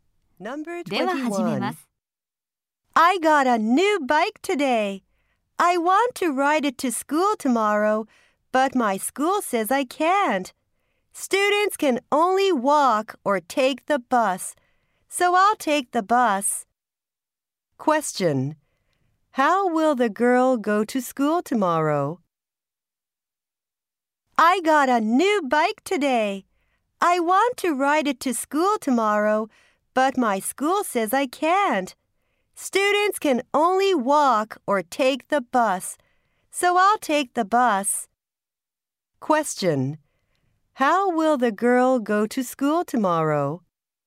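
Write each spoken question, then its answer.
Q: How will the girl go to school tomorrow?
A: By bus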